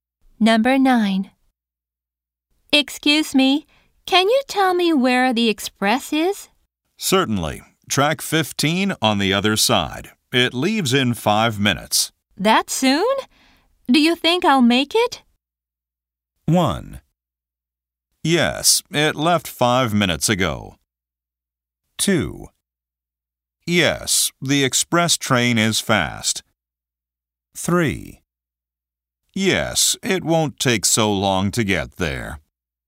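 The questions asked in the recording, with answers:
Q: That soon? Do you think I'll make it?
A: 3: Yes, it won't take so long to get there.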